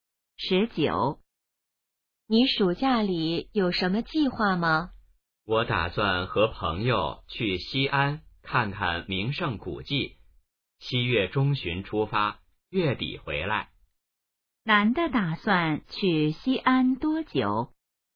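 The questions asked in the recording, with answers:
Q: 男的打算去西安多久?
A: 半个月左右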